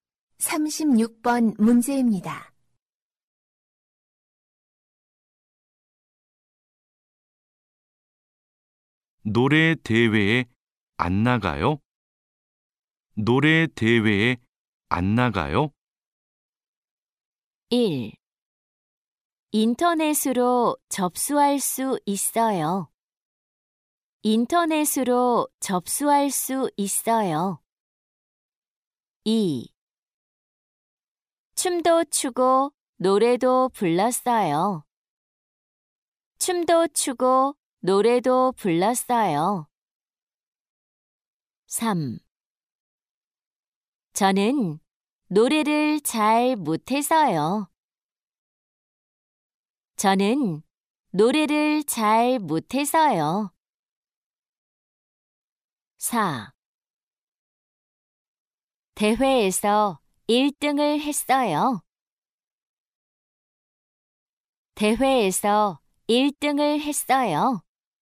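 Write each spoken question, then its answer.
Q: 노래 대회에 안 나가요?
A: 3: 저는 노래를 잘 못해서요.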